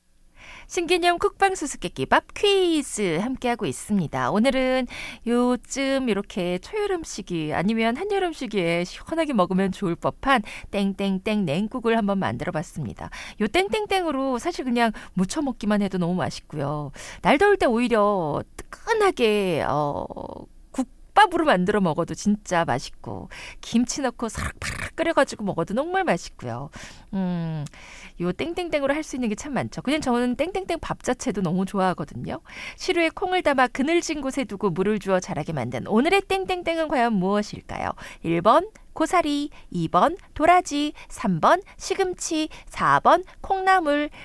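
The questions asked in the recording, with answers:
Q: 시루에 콩을 담아 그늘진 곳에 두고 물을 주어 자라게 만든 오늘의 땡땡땡은 과연 무엇일까요?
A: 4: 콩나물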